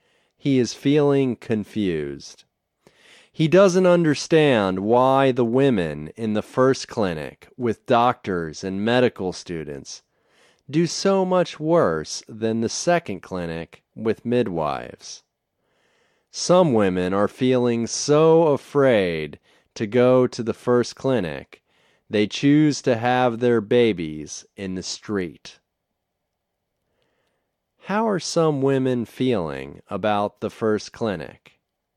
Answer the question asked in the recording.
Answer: They are feeling afraid to go to the first clinic.